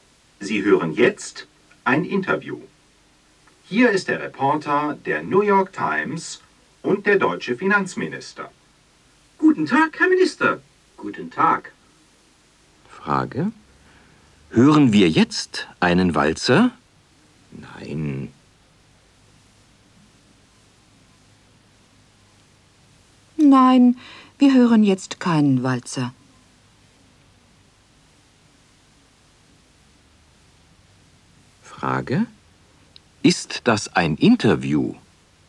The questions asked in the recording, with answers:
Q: Ist das ein Interview?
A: Ja, das ist ein Interview.